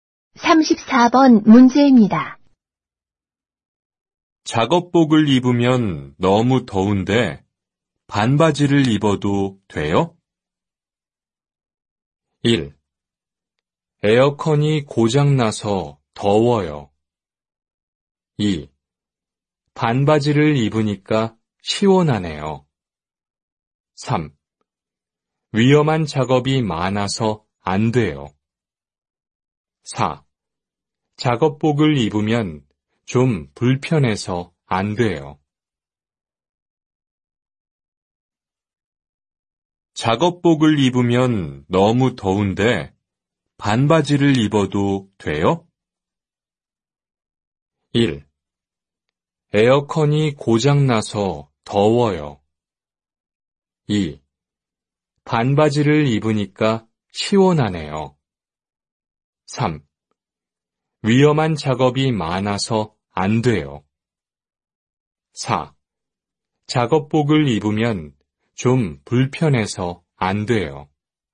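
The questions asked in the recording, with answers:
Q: 작업복을 입으면 너무 더운데 반바지를 입어도 돼요?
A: 3: 위험한 작업이 많아서 안 돼요.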